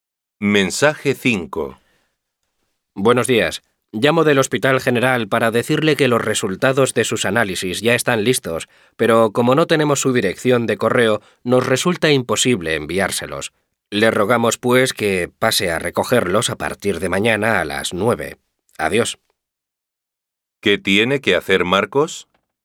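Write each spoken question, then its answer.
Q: ¿Qué tiene que hacer Marcos?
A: Ir a recoger los resultados de sus análisis al hospital a partir de mañana a las 9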